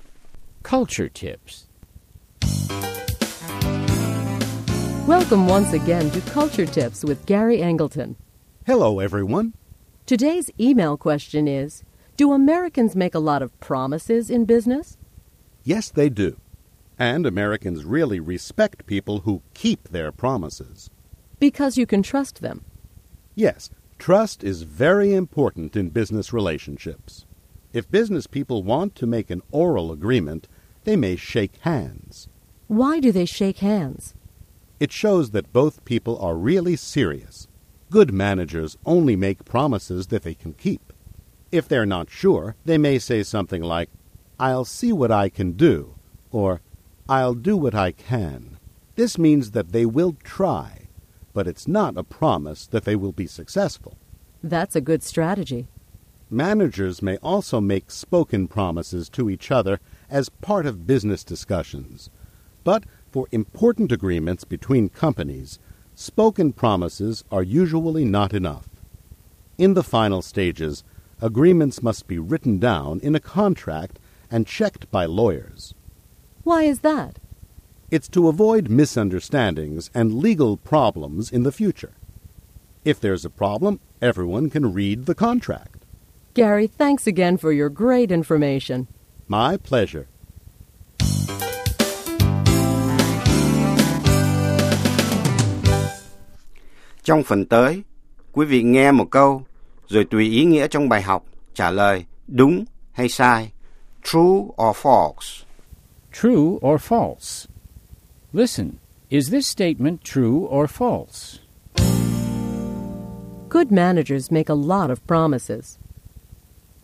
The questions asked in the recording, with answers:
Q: Good managers make a lot of promises.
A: False. Good managers only make promises that they can keep.